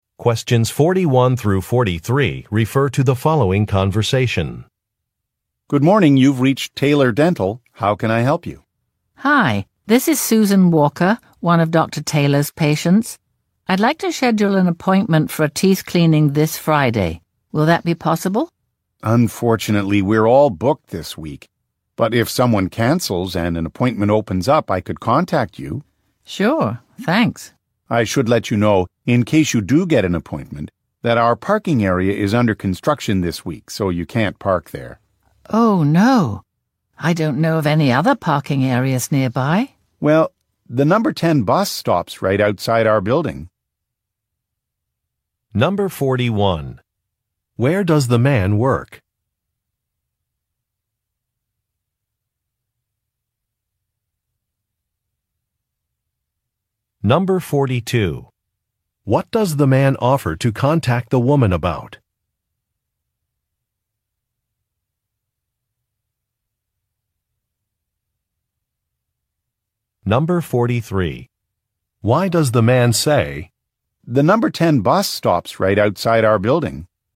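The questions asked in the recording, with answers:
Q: Where does the man work?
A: At a dental office

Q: What does the man offer to contact the woman about?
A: An appointment opening up if someone cancels

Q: Why does the man say, "The number 10 bus stops right outside our building"?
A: To suggest she take the bus because parking is unavailable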